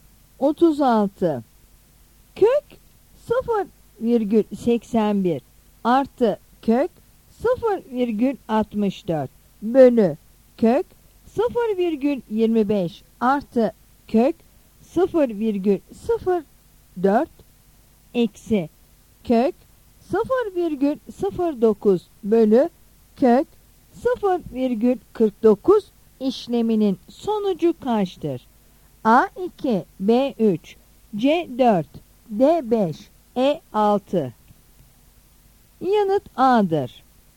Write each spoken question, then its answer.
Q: Kök 0,81 artı kök 0,64 bölü kök 0,25 artı kök 0,04 eksi kök 0,09 bölü kök 0,49 işleminin sonucu kaçtır?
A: Yanıt A'dır.